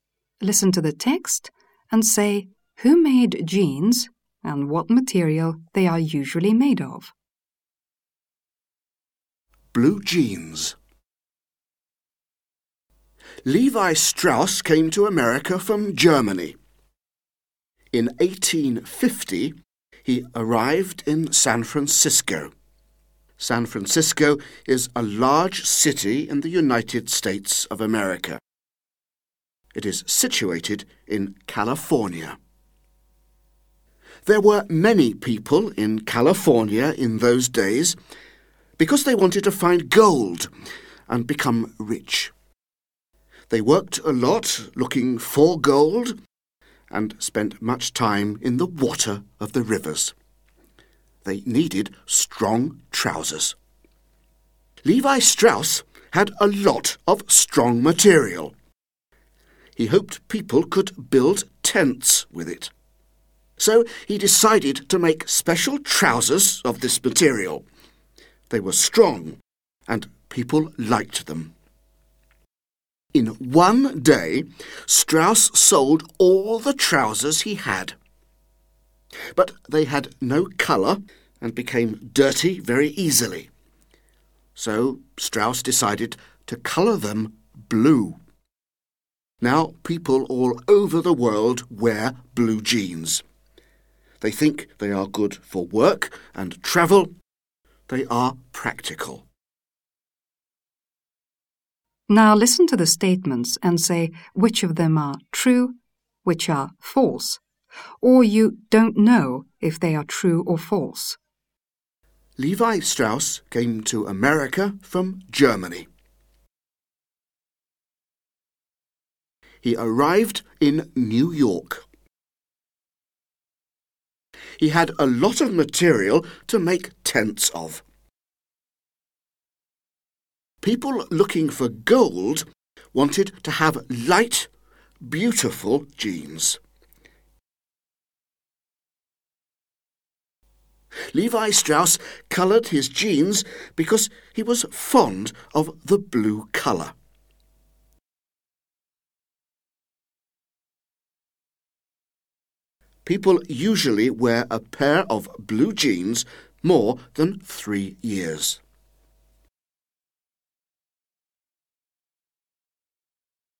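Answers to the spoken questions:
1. Levi Strauss made them, from strong (tent) material
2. True
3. False (he arrived in San Francisco)
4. True
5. False (they wanted strong trousers)
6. False (they had no colour and got dirty easily)
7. Don't know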